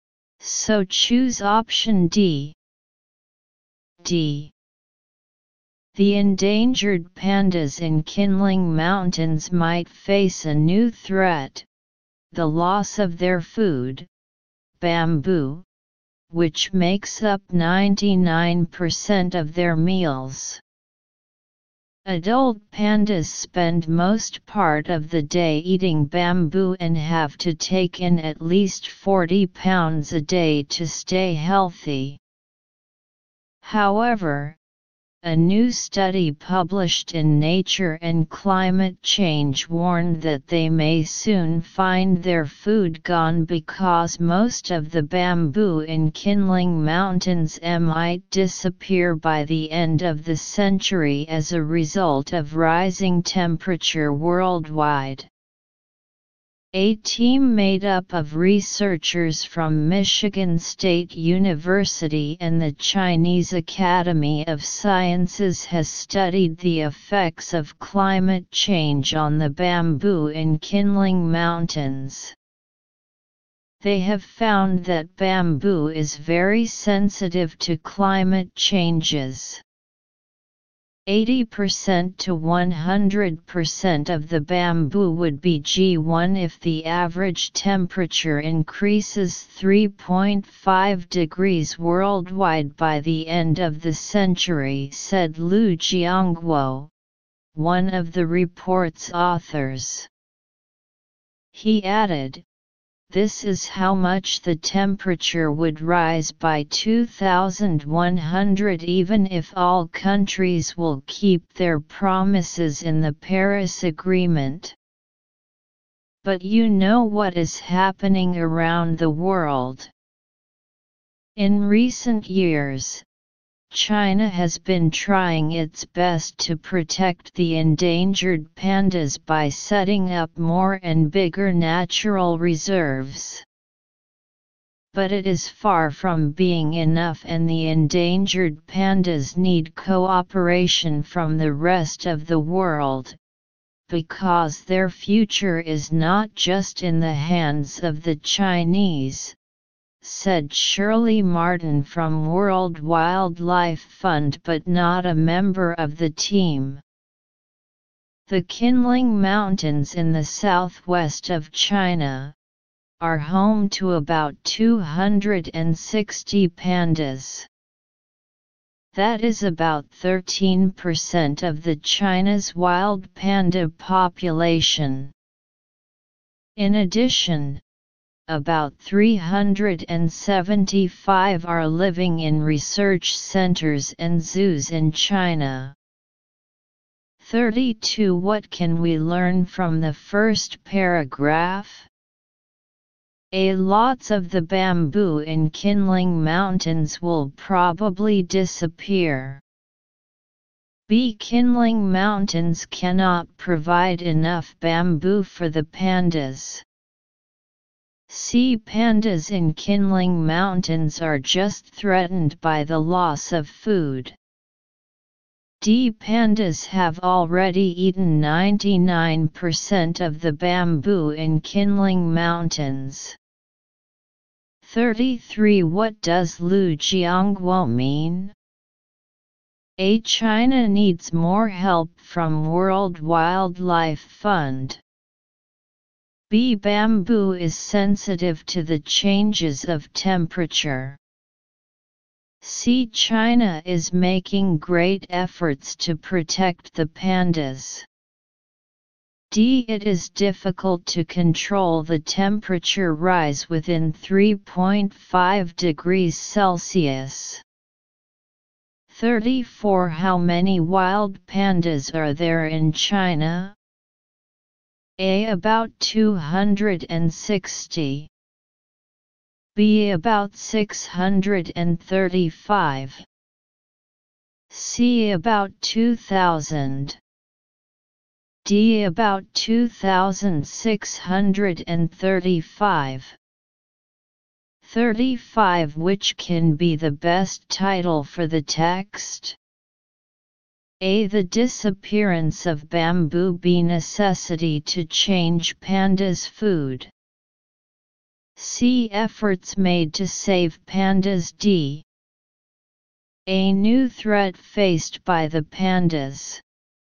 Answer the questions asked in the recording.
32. Answer 32. A.
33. 33. D.
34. 34. C.
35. 35. D.